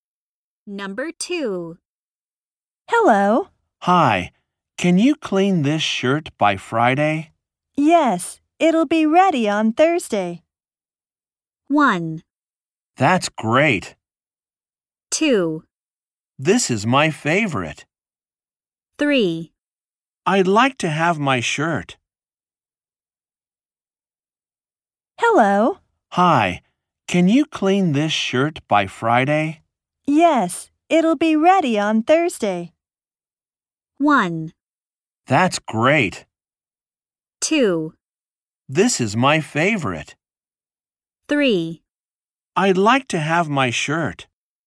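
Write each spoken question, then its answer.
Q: Yes.It'll be ready on Thursday.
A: 1: That's great.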